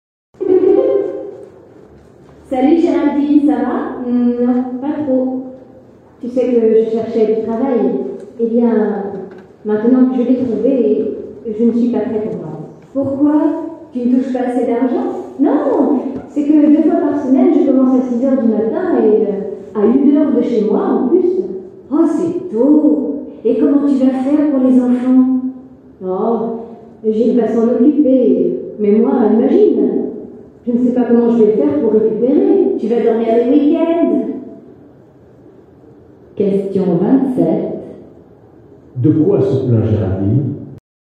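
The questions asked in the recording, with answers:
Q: De quoi se plaint Géraldine?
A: De ses horaires: elle commence à 6h du matin, à 1h de chez elle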